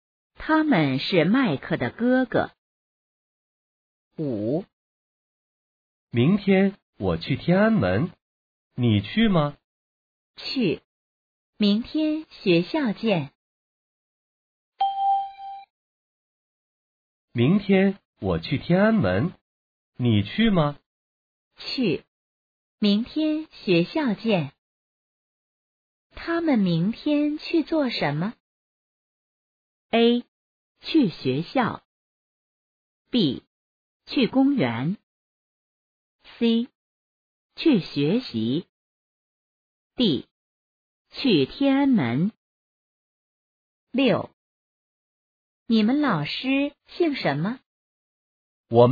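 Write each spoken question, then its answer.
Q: 他们明天去做什么?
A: D: 去天安门。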